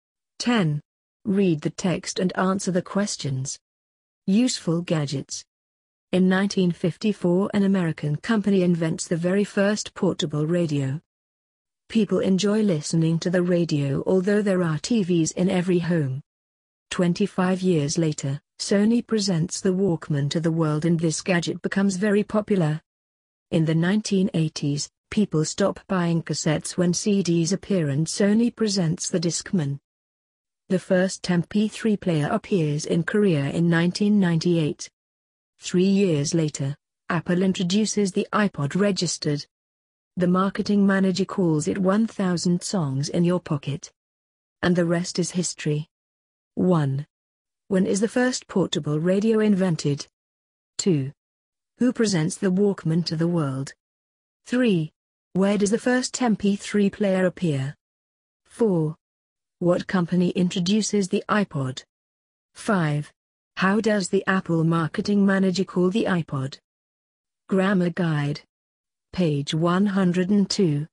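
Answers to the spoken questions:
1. In 1954
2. Sony
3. In Korea
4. Apple
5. 1,000 songs in your pocket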